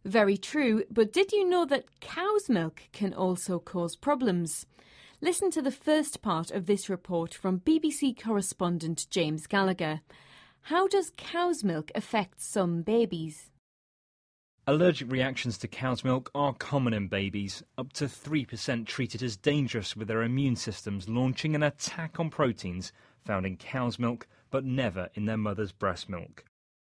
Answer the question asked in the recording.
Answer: It's quite common for babies to have allergic reactions to cow's milk, so their bodies are attacking it.